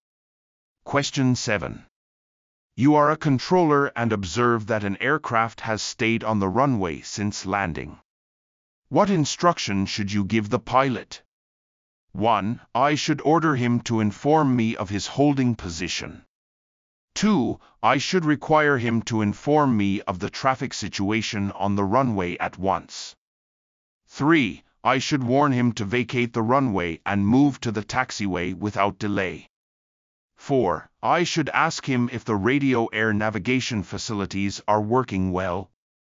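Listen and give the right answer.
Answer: 3: I should warn him to vacate the runway and move to the taxiway without delay.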